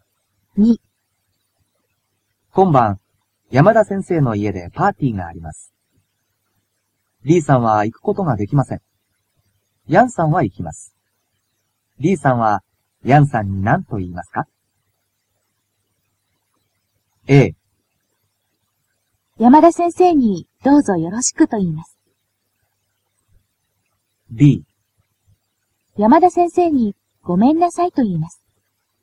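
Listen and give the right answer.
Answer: A: 山田先生にどうぞよろしくと言います。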